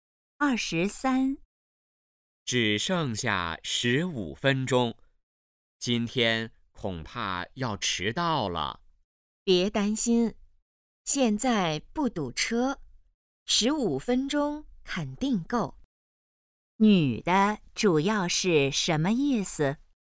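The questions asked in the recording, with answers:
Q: 女的主要是什么意思?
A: 不会迟到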